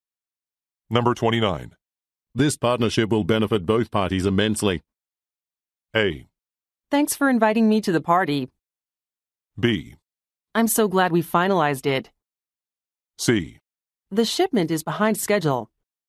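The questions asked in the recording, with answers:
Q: This partnership will benefit both parties immensely.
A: B: I'm so glad we finalized it.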